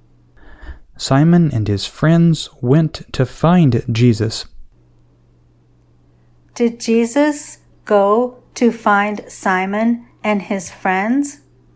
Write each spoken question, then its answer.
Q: Did Jesus go to find Simon and his friends?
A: No, Simon and his friends went to find Jesus.